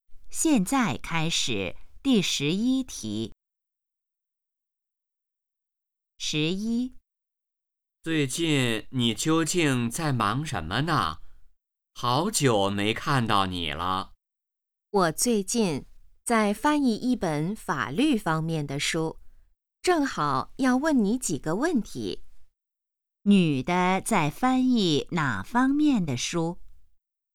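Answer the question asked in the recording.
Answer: 法律方面的书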